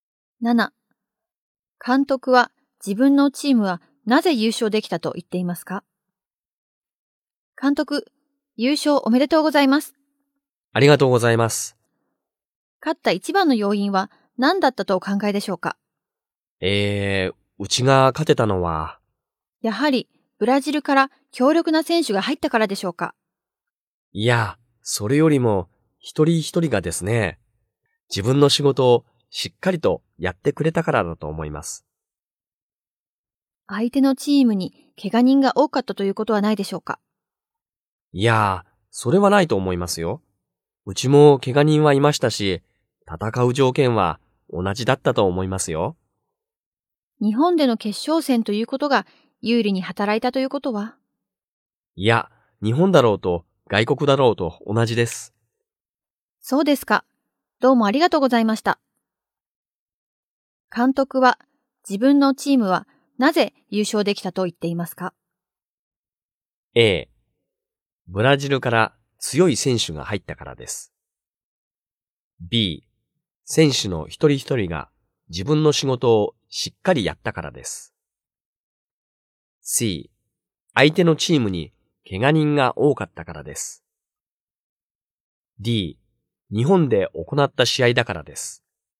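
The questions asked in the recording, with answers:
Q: 監督は自分のチームはなぜ優勝できたと言っていますか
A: B: 選手の一人一人が自分の仕事をしっかりやったからです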